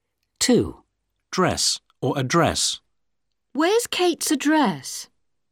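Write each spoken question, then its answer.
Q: Dress or address.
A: address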